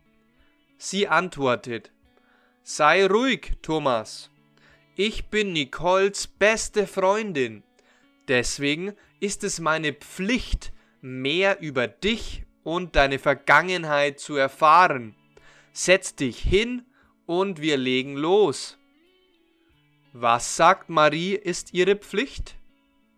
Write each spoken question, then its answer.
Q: Was sagt Marie, ist ihre Pflicht?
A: Sie sagt, es ist ihre Pflicht, als Nicoles beste Freundin mehr über Thomas und über seine Vergangenheit zu erfahren.